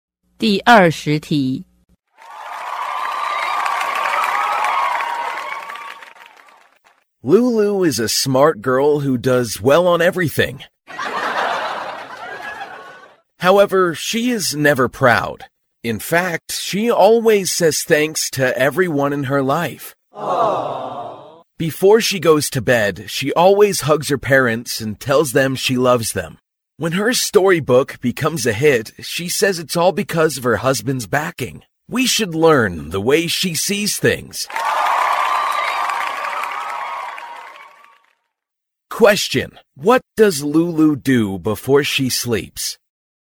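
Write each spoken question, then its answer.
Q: what does Lulu do before she sleeps?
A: She hugs her parents and tells them she loves them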